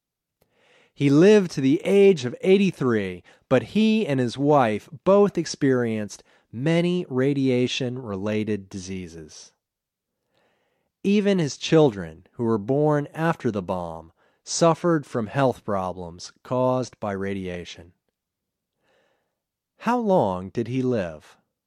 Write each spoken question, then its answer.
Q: How long did he live?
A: He lived to the age of 83.